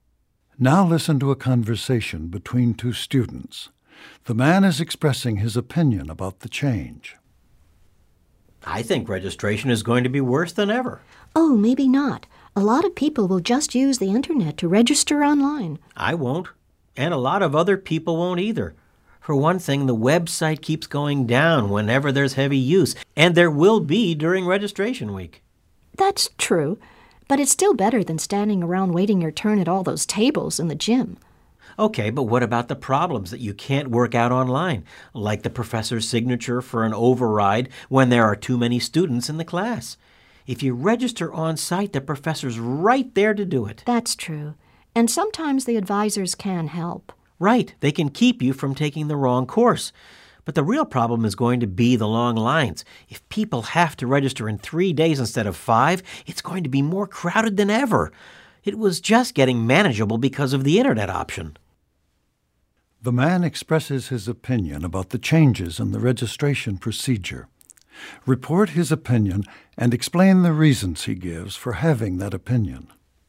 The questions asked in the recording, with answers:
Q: The man expresses his opinion about the changes in the registration procedure. Report his opinion and explain the reasons he gives for having that opinion.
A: The man thinks that the changes in registration will cause problems for the students.